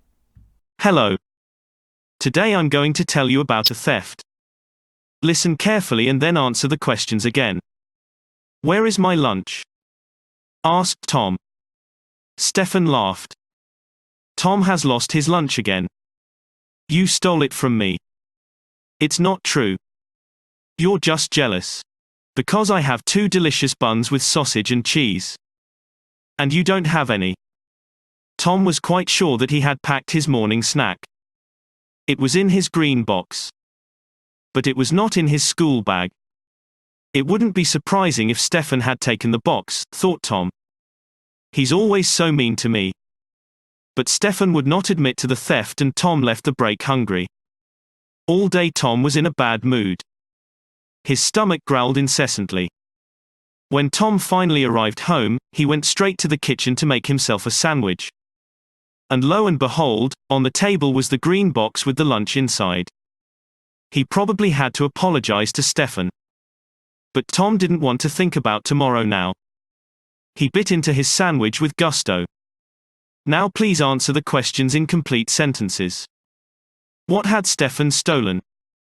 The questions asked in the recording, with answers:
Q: What had Stefan stolen?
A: Stefan did not steal anything at all, but was falsely accused of stealing.